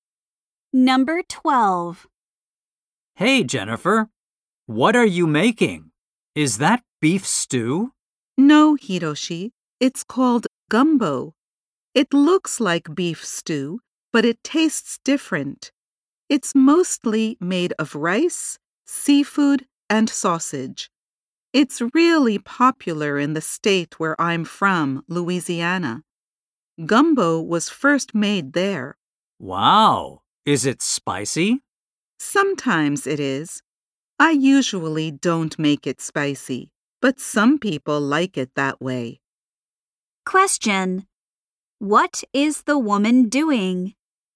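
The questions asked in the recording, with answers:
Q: What is the woman doing?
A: Making gumbo.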